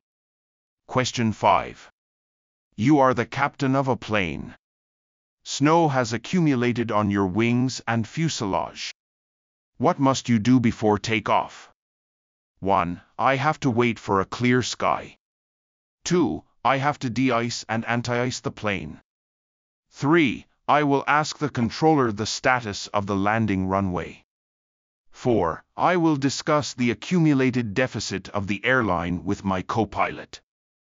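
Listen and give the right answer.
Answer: 2: I have to de-ice and anti-ice the plane.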